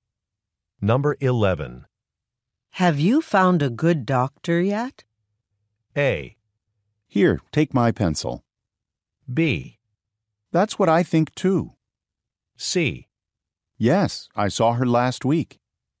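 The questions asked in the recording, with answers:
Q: Have you found a good doctor yet?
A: C: Yes, I saw her last week.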